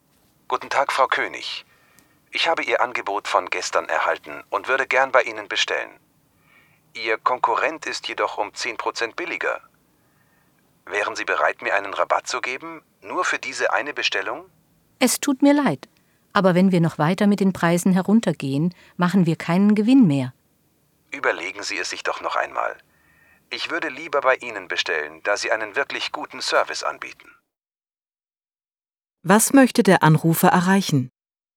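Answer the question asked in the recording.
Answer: Einen Rabatt für diese Bestellung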